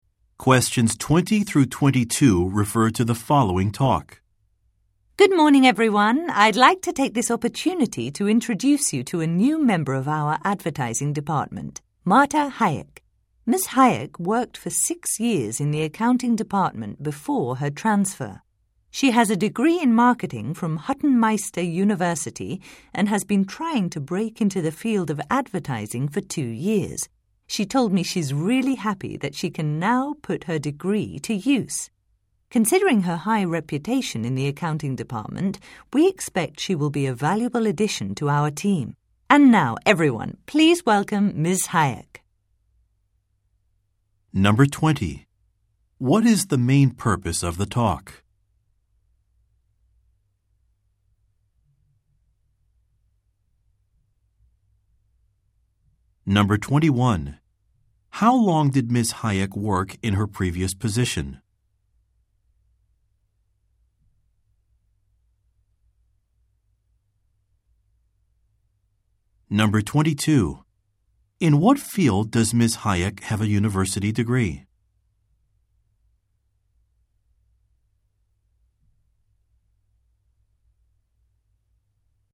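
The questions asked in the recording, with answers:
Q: What is the main purpose of the talk?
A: To introduce a new member of the advertising department

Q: How long did Ms. Hayek work in her previous position?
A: 6 years

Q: In what field does Ms. Hayek have a university degree?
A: Marketing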